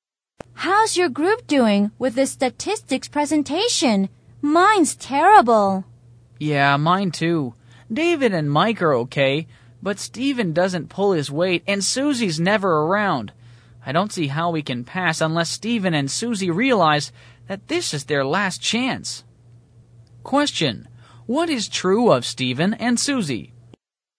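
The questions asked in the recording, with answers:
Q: what is true of Stephen and Susie?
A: They are not doing their share of the group work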